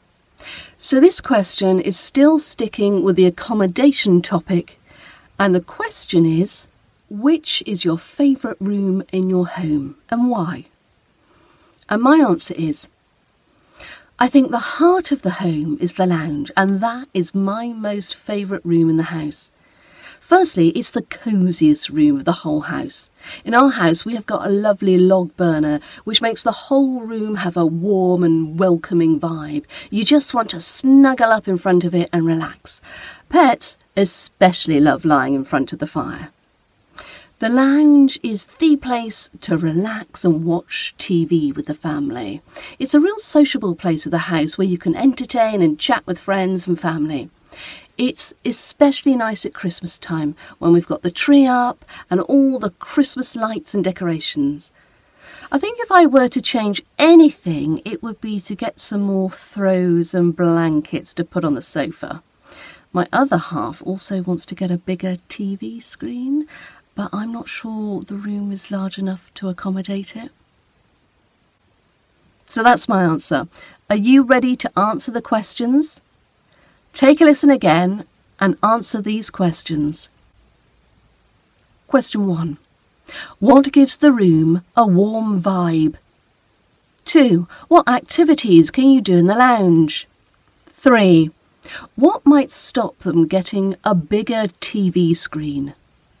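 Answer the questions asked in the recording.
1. The log burner
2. Relax, watch TV with the family, entertain and chat with friends and family
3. The room may not be large enough to accommodate it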